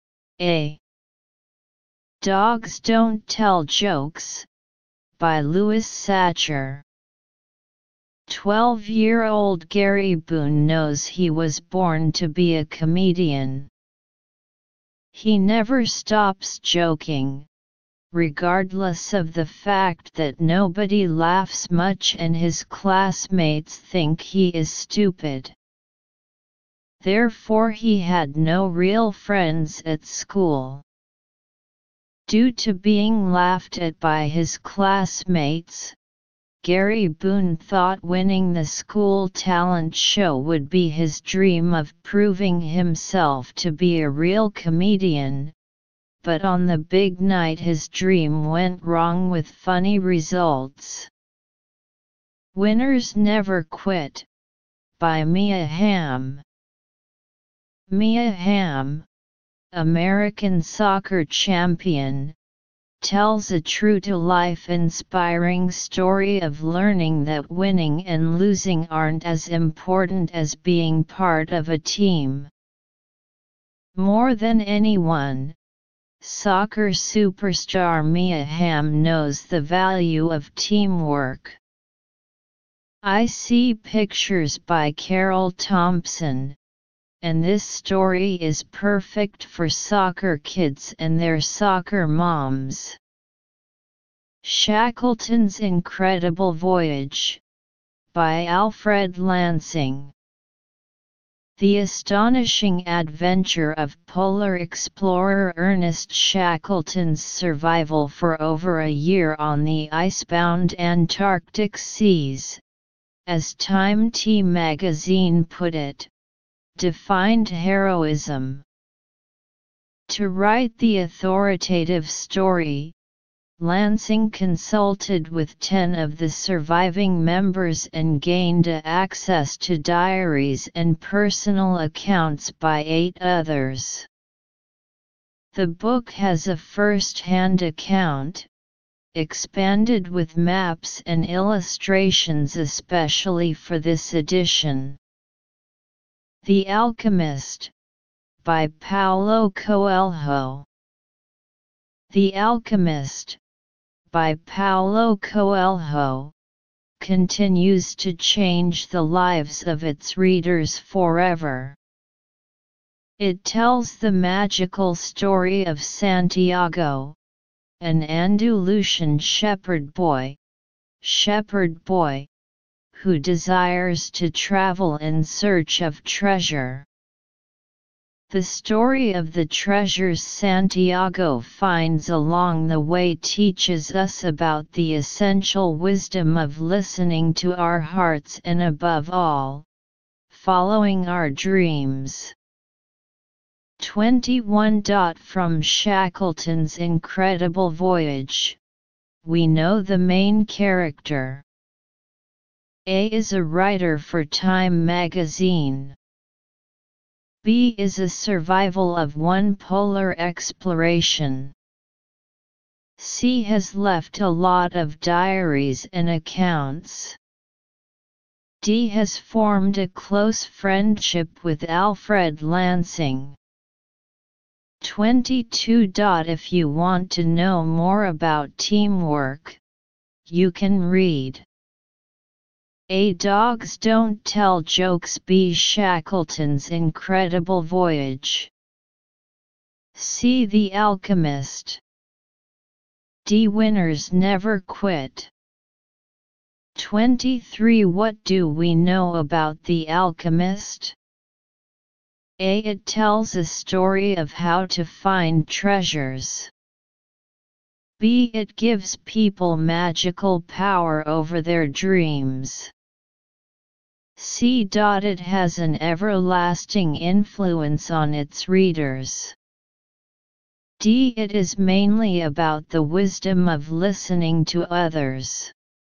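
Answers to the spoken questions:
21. B: is a survival of one polar exploration.
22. D: Winners Never Quit.
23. C: It has an everlasting influence on its readers.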